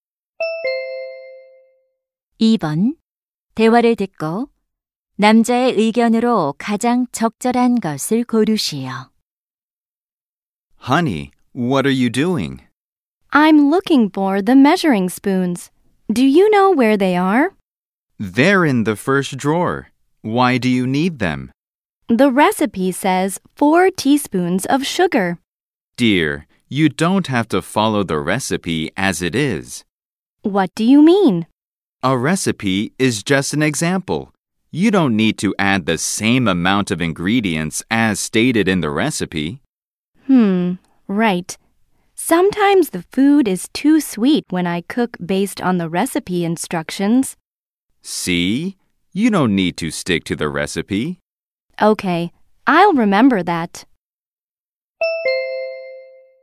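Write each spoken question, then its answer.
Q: 대화를 듣고 남자의 의견으로 가장 적절한 것을 고르시오.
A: 요리할 때 조리법을 그대로 따를 필요는 없다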